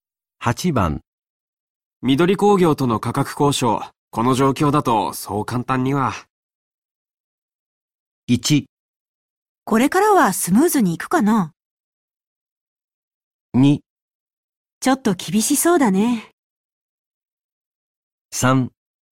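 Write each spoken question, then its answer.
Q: 緑工業との価格交渉、この状況だとそう簡単には。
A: 2: ちょっと厳しそうだね。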